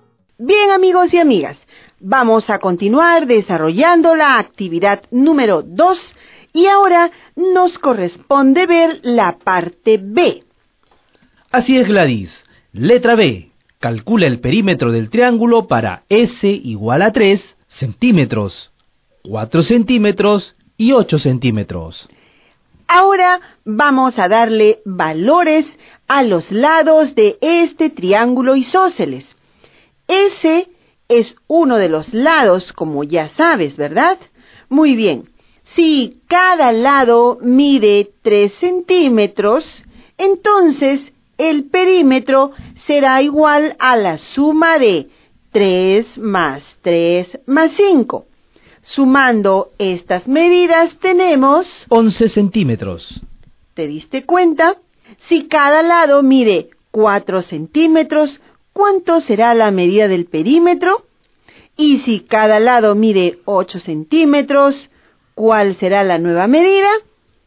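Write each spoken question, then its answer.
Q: Si cada lado mide 4 centímetros, ¿cuánto será la medida del perímetro?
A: 13 centímetros

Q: Y si cada lado mide 8 centímetros, ¿cuál será la nueva medida?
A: 21 centímetros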